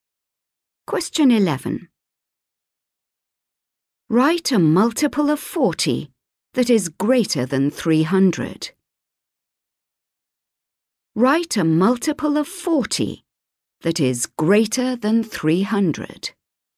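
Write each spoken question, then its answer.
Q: Write a multiple of 40 that is greater than 300.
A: e.g. 320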